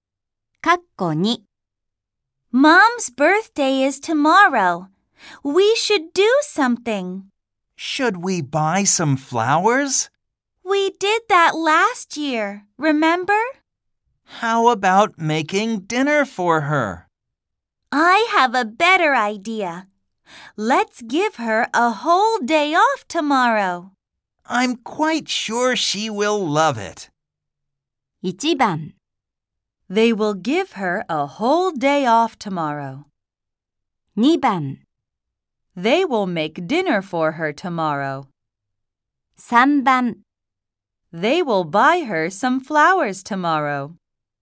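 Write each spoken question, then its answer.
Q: They will give her a whole day off tomorrow.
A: 1: They will give her a whole day off tomorrow.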